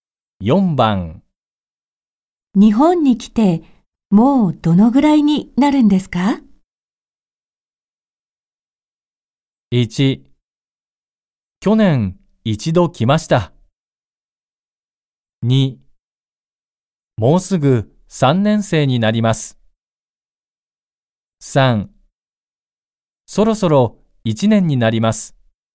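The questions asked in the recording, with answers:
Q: 日本に来てもうどのぐらいになるんですか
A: 3: そろそろ1年になります。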